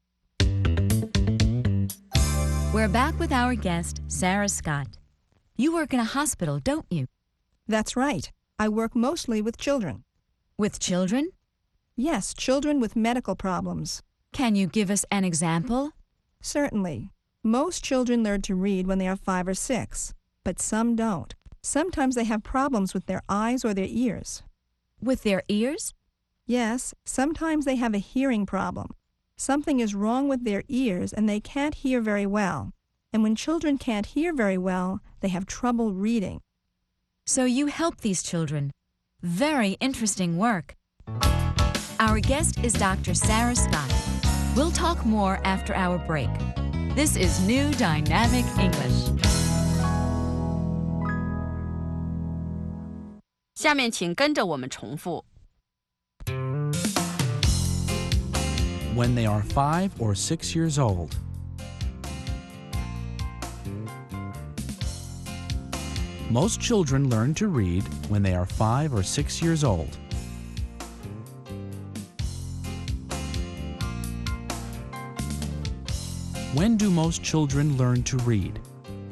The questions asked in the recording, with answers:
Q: When do most children learn to read?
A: Most children learn to read when they are 5 or 6 years old.